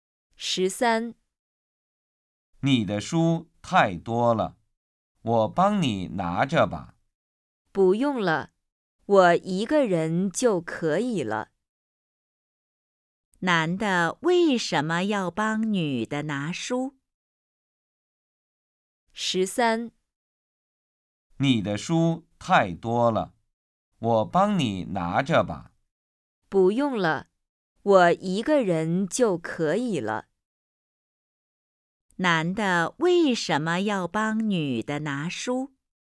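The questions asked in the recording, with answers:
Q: 男的为什么要帮女的拿书?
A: 因为女的书太多了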